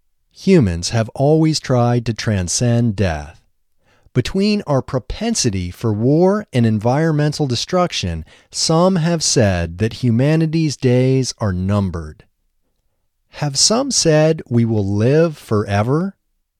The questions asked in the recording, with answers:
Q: Have some said we will live forever?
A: No, some haven't said we will live forever.